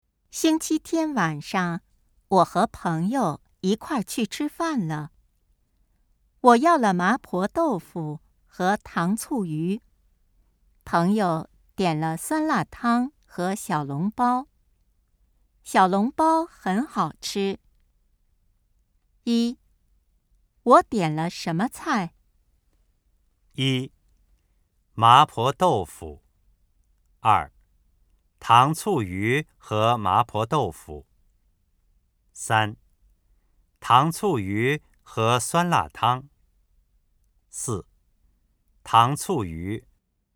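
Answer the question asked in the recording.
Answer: 二:糖醋鱼和麻婆豆腐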